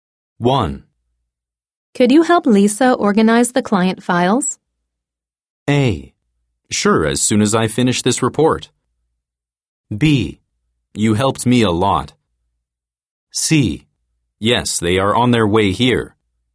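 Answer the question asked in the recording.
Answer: A: Sure, as soon as I finish this report.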